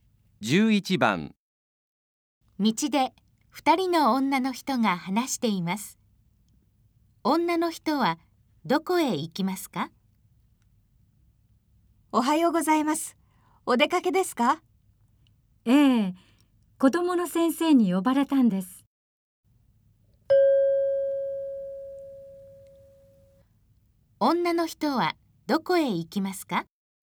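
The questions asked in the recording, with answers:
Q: 女の人はどこへ行きますか?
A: 学校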